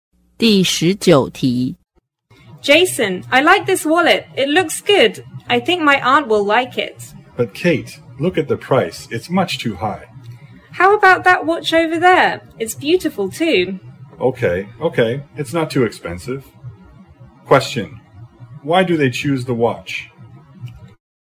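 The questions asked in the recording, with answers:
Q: why do they choose the watch?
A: The wallet is too expensive; the watch is not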